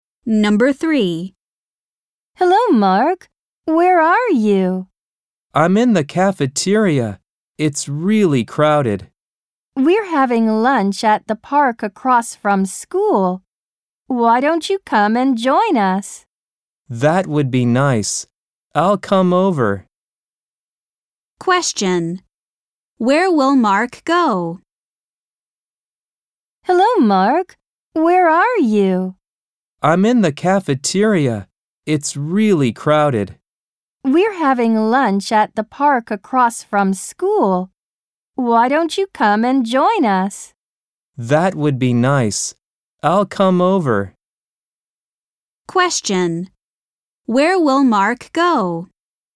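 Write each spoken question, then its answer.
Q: Where will Mark go?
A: To the park across from school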